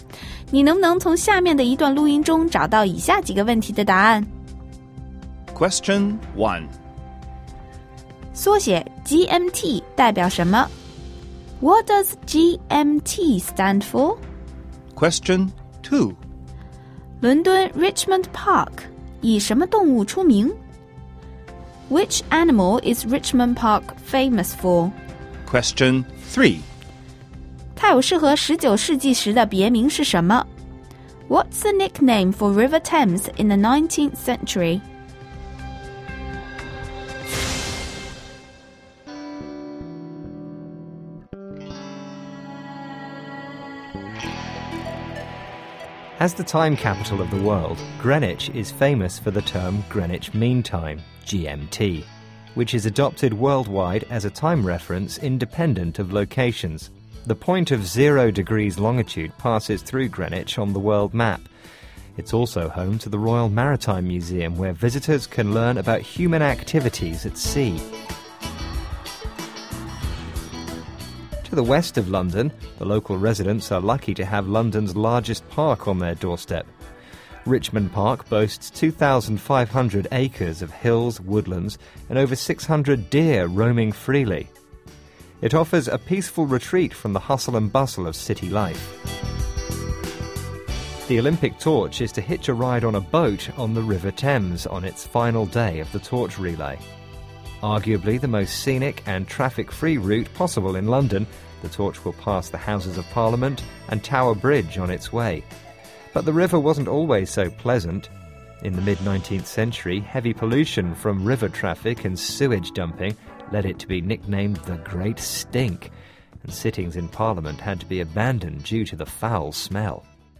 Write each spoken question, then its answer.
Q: 缩写 GMT 代表什么? What does GMT stand for?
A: GMT 是 Greenwich Mean Time 的缩写

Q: Which animal is Richmond Park famous for?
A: 这里的鹿是最出名的

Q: What's the nickname for River Thames in the 19th century?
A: 所以被称为 Great Stink, 超级臭河